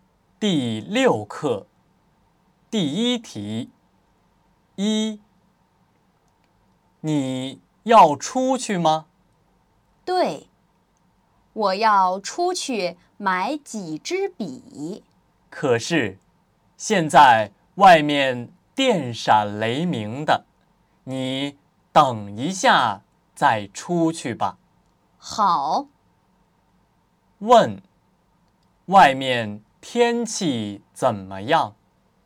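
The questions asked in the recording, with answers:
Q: 问,外面天气怎么样?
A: 电闪雷鸣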